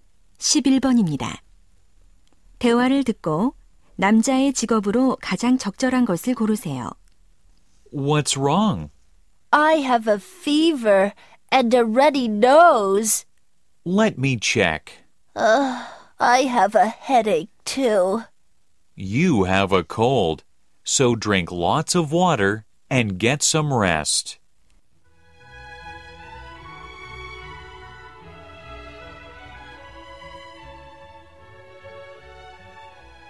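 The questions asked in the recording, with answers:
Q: 대화를 듣고 남자의 직업으로 가장 적절한 것을 고르세요.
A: 의사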